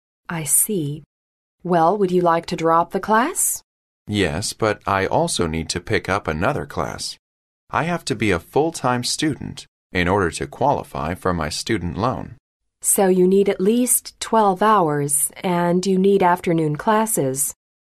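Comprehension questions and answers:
Why does the man need to take at least twelve hours?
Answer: He must be a full-time student to qualify for his loan.

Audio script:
W: I see. Well, would you like to drop the class?
M: Yes, but I also need to pick up another class. I have to be a full-time student in order to qualify for my student loan.
W: So you need at least twelve hours. And you need afternoon classes.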